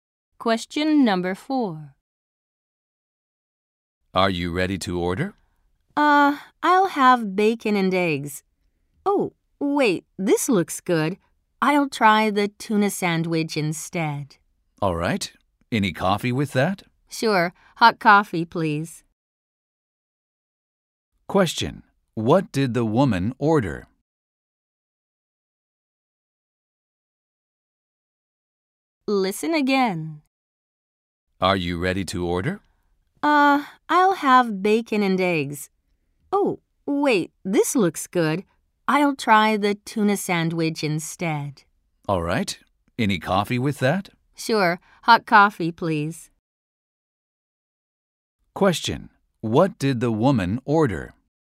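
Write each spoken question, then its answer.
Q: What did the woman order?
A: A tuna sandwich and hot coffee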